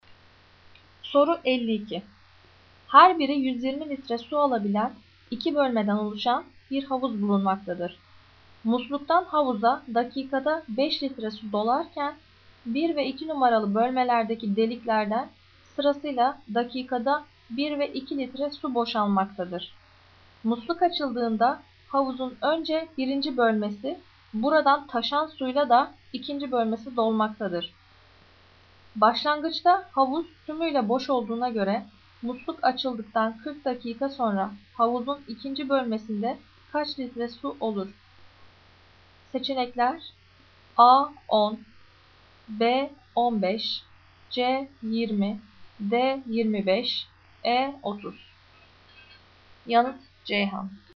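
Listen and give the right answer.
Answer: C: 20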